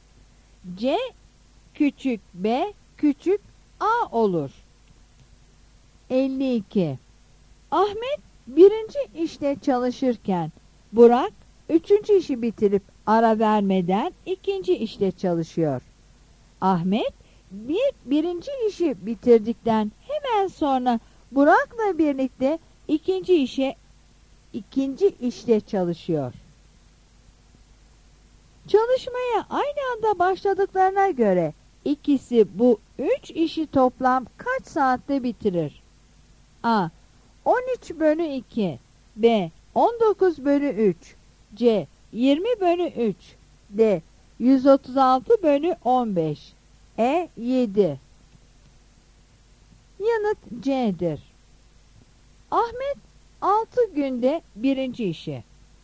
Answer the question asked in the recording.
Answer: Yanıt C'dir.